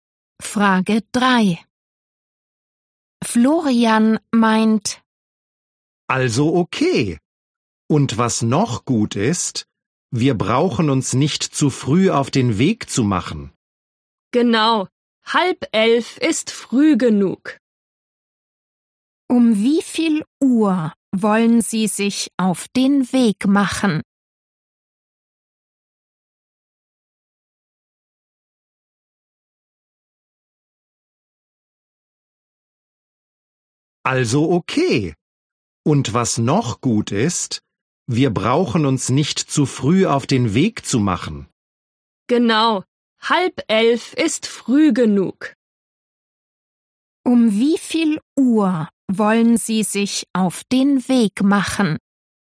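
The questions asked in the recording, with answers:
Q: Um wie viel Uhr wollen Sie sich auf den Weg machen?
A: Um 10:30 Uhr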